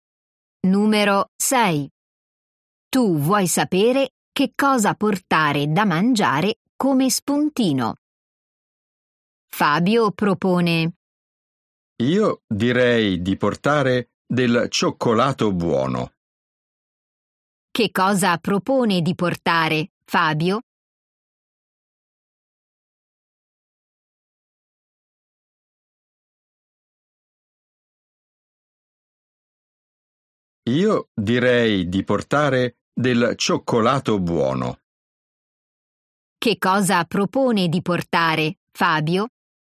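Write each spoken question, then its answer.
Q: Che cosa propone di portare Fabio?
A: Del cioccolato buono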